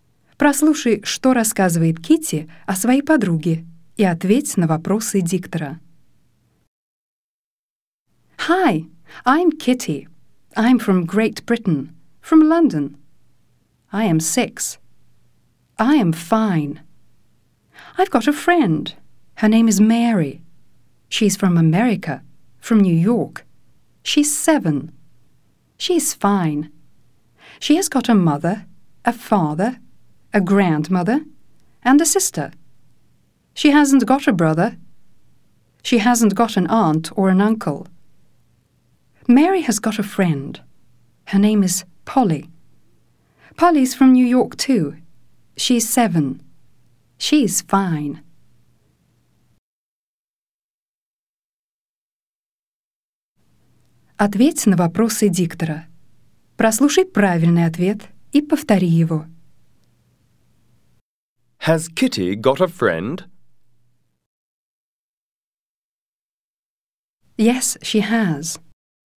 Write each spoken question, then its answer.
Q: Has Kitty got a friend?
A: Yes, she has.